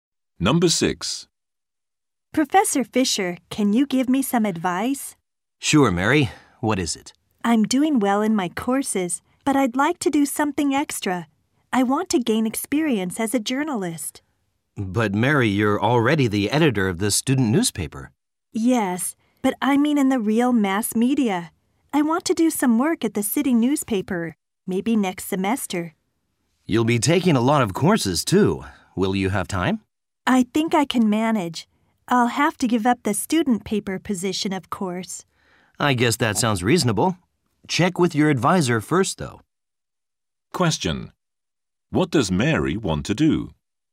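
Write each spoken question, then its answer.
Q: What does Mary want to do?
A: Work at the city newspaper next semester to gain journalism experience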